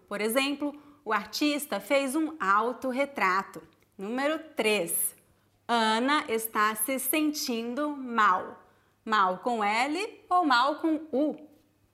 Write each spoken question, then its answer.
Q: Mal com L ou mal com U?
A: Mal com L.